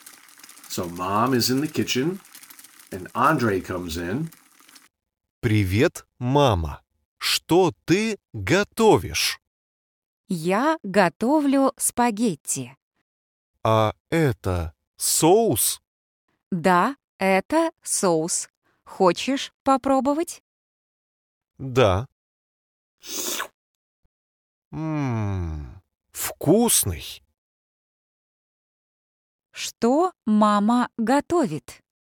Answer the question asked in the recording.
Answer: Мама готовит спагетти.